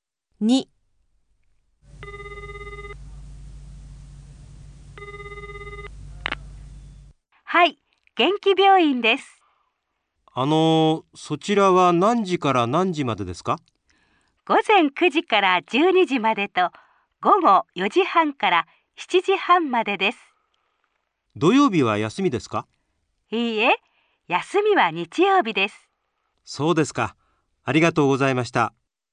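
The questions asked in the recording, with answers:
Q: 何時から何時までですか?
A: 午前9時から12時までと、午後4時半から7時半まで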